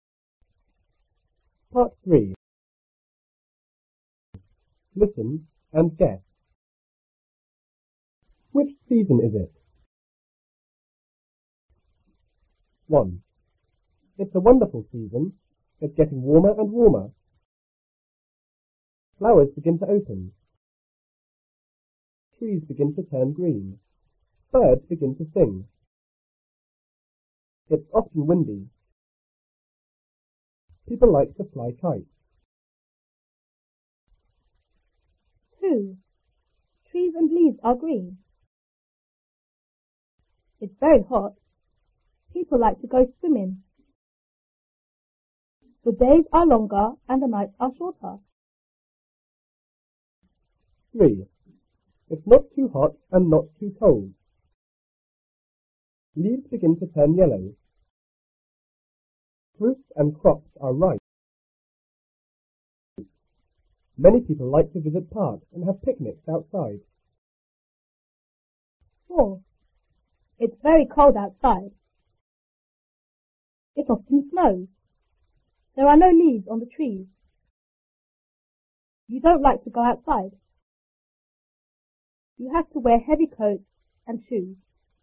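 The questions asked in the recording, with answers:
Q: Which season is it?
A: Spring

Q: Which season is it?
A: Summer

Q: Which season is it?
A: Autumn

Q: Which season is it?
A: Winter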